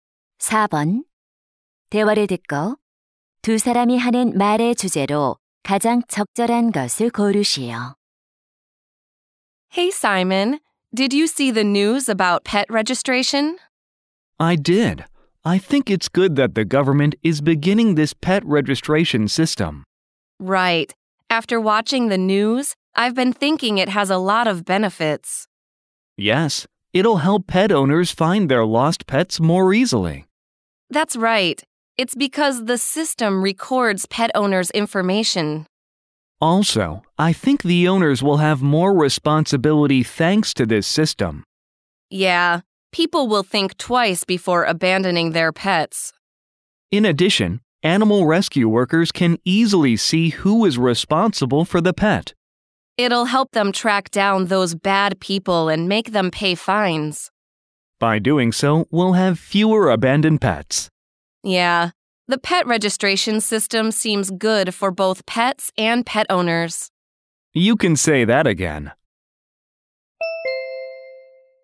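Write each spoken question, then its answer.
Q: 대화를 듣고 두 사람이 하는 말의 주제로 가장 적절한 것을 고르시오.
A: 반려동물 등록제의 이점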